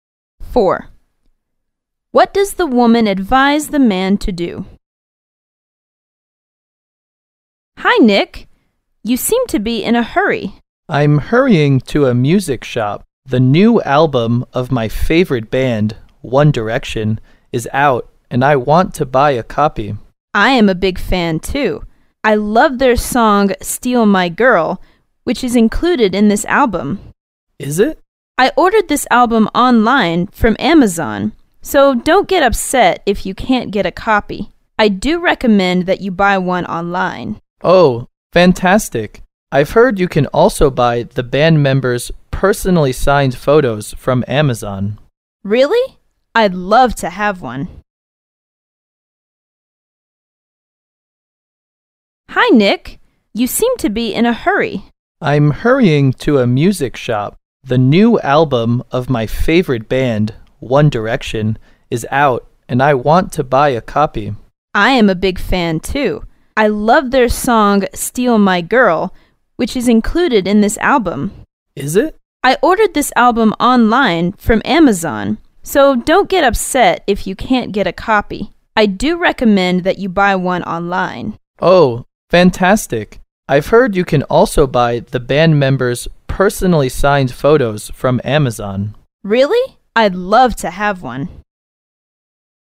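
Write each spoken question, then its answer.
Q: What does the woman advise the man to do?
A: Buy the album online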